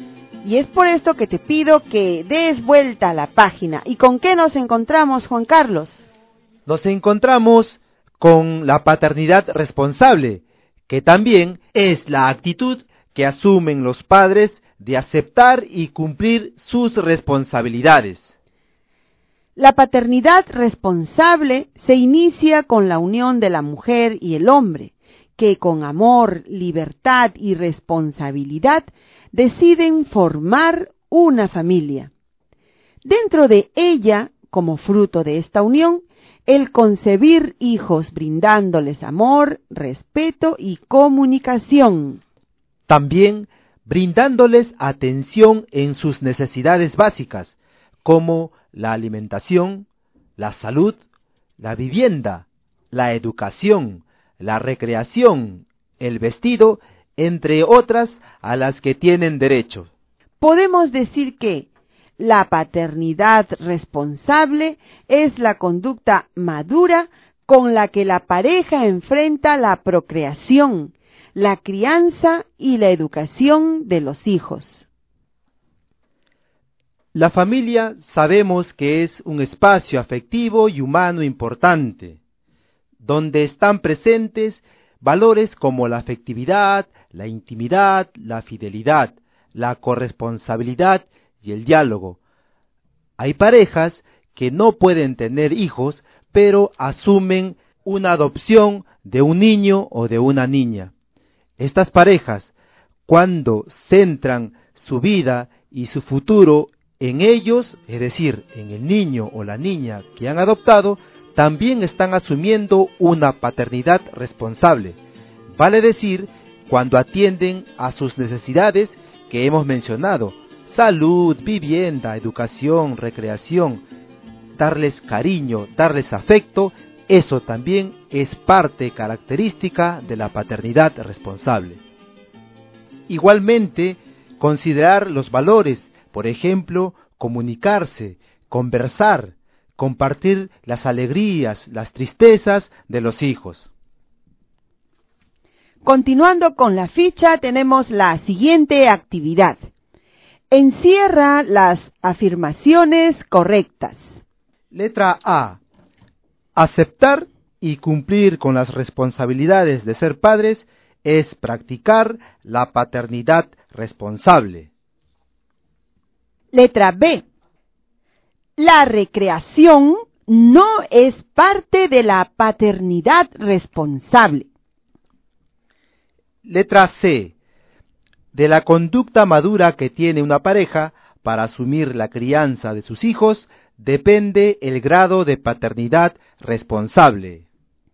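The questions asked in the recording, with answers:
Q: Aceptar y cumplir con las responsabilidades de ser padres es practicar la paternidad responsable.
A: Correcta

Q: La recreación no es parte de la paternidad responsable.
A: Incorrecta

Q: De la conducta madura que tiene una pareja para asumir la crianza de sus hijos, depende el grado de paternidad responsable.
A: Correcta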